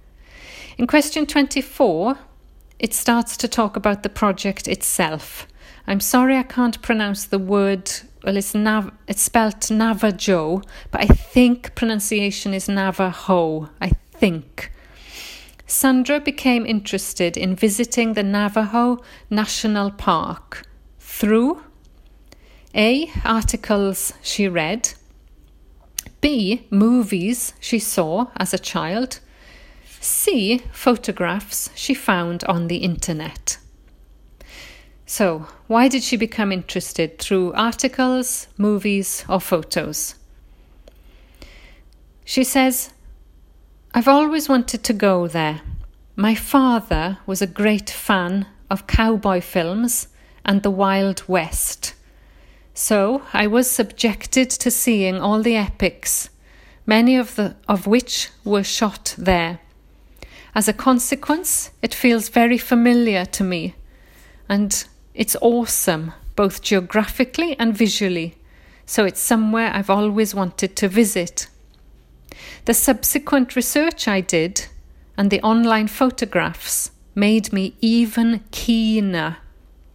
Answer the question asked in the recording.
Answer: So the answer is movies she saw as a child.